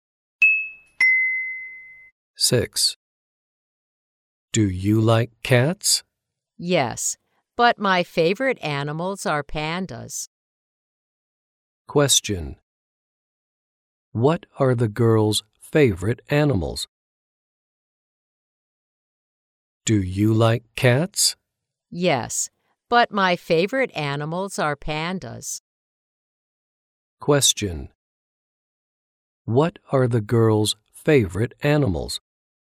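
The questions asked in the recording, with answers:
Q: What are the girl's favorite animals?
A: Pandas.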